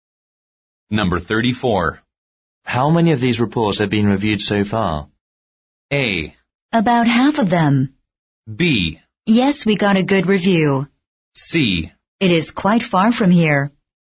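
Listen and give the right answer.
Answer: A: About half of them.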